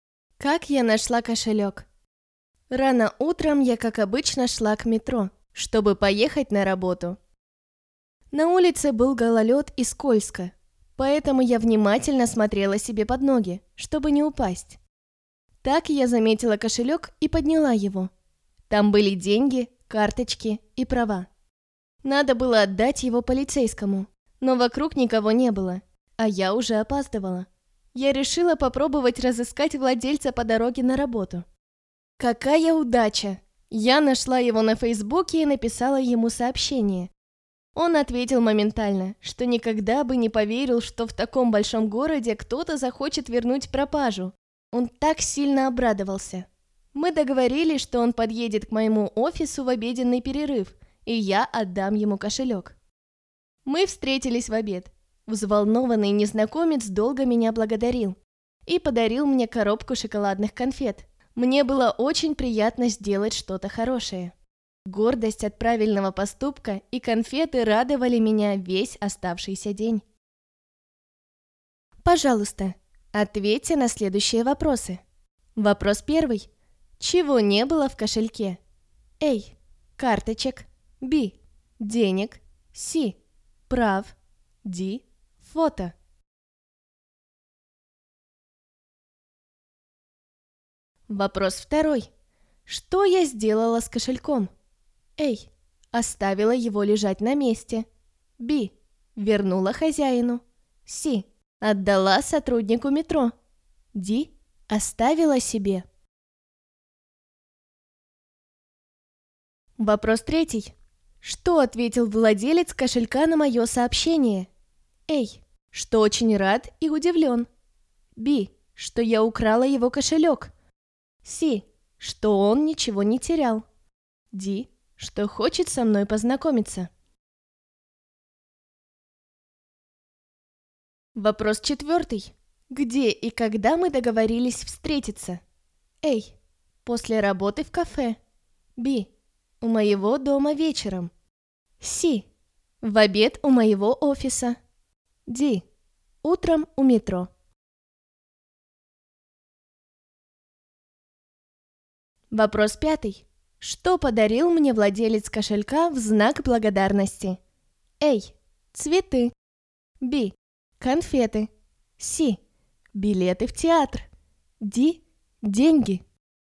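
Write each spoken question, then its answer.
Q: Чего не было в кошельке?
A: D: Фото

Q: Что я сделала с кошельком?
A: B: Вернула хозяину

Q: Что ответил владелец кошелька на мое сообщение?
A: A: Что очень рад и удивлен

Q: Где и когда мы договорились встретиться?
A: C: В обед у моего офиса

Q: Что подарил мне владелец кошелька в знак благодарности?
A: B: Конфеты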